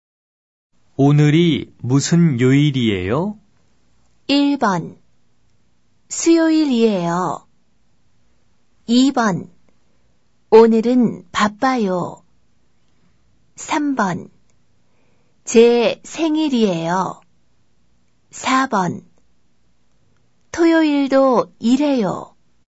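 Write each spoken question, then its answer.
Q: 오늘이 무슨 요일이에요?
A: 1: 수요일이에요.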